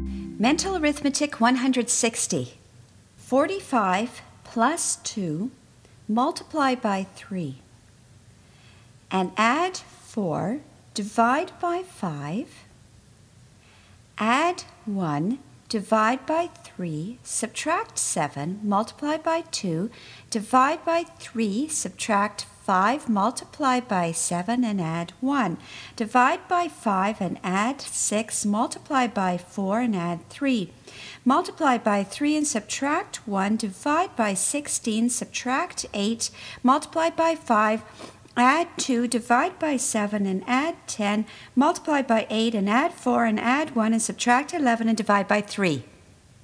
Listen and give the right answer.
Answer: And the answer is 14.